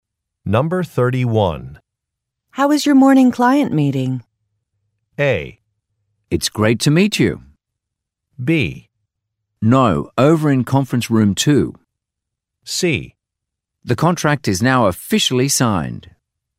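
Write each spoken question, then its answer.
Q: How was your morning client meeting?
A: C: The contract is now officially signed.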